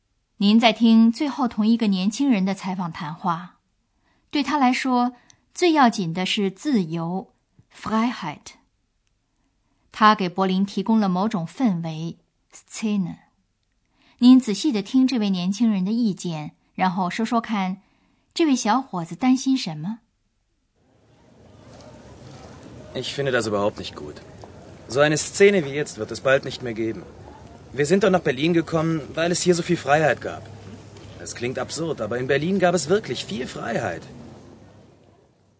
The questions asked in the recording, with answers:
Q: 您仔细地听这位年轻人的意见,然后说说看,这位小伙子担心什么?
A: 这位年轻人担心的是,像现在这样的氛围很快就不会再有了。